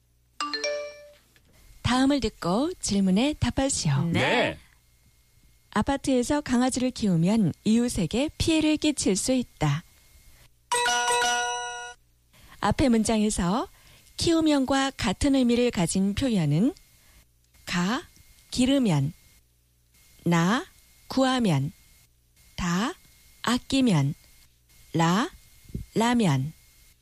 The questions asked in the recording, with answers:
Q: 앞에 문장에서 키우면과 같은 의미를 가진 표현은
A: 가 키우면 to raise to bring up.